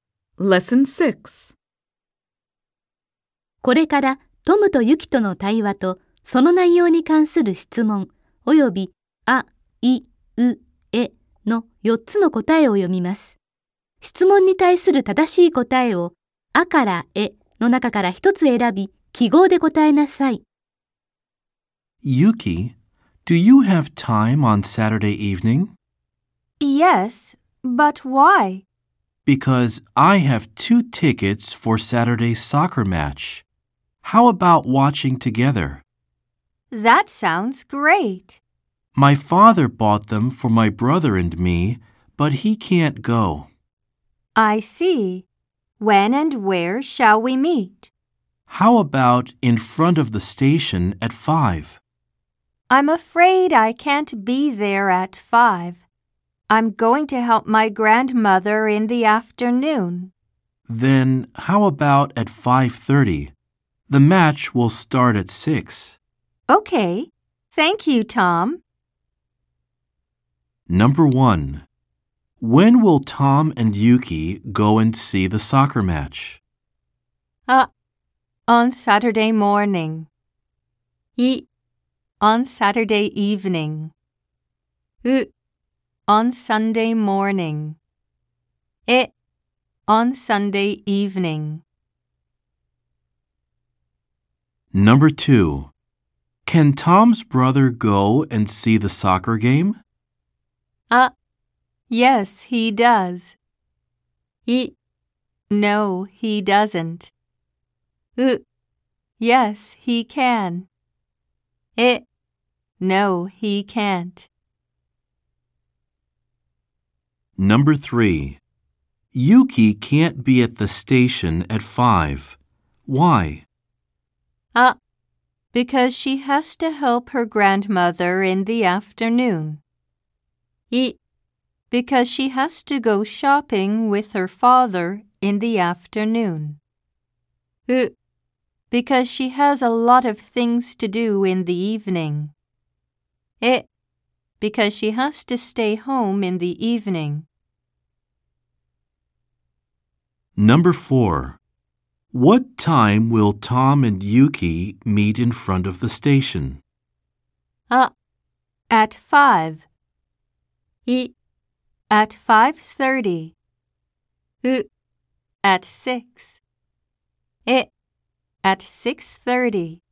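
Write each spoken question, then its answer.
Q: When will Tom and Yuki go and see the soccer match?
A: い: On Saturday evening.

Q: Can Tom's brother go and see the soccer game?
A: え: No, he can't.

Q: Yuki can't be at the station at 5. Why?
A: あ: Because she has to help her grandmother in the afternoon.

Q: What time will Tom and Yuki meet in front of the station?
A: い: At 5:30.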